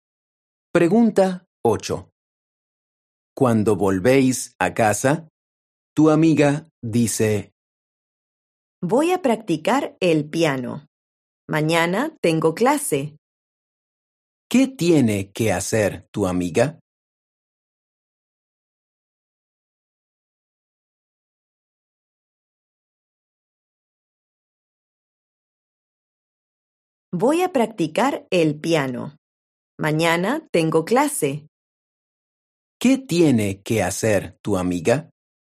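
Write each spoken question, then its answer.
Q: ¿Qué tiene que hacer tu amiga?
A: practicar el piano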